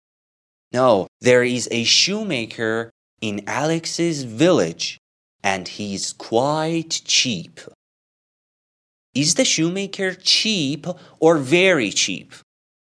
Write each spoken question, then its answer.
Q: Is the shoemaker cheap or very cheap?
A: The shoemaker is quite cheap.